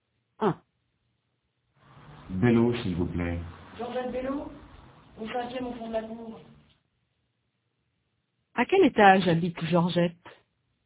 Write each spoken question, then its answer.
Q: À quel étage habite Georgette?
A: Au 5e, au 5e étage.